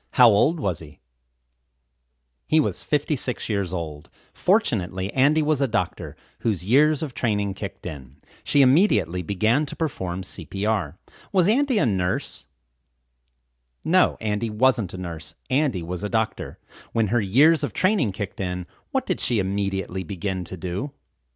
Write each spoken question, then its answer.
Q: When her years of training kicked in, what did she immediately begin to do?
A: When her years of training kicked in, she immediately began to perform CPR.